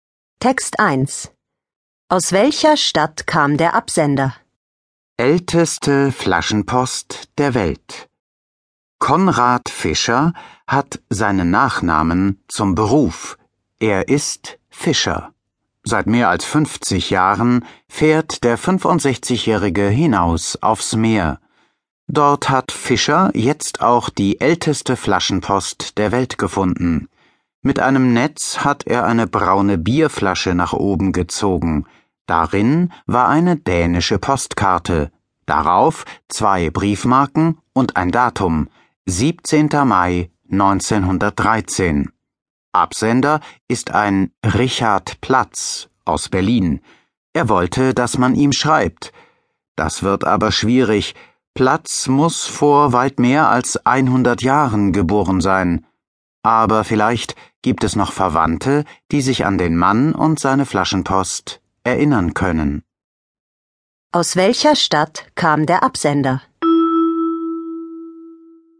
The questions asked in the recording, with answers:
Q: Aus welcher Stadt kam der Absender?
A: Aus Berlin.